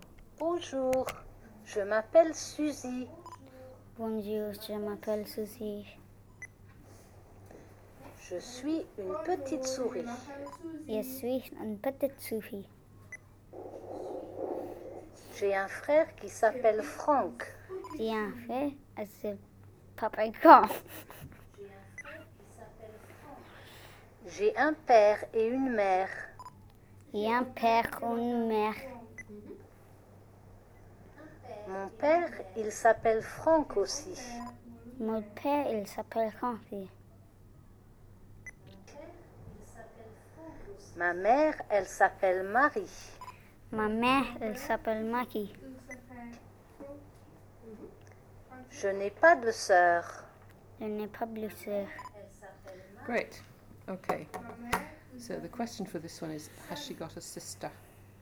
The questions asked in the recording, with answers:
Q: has she got a sister?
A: No.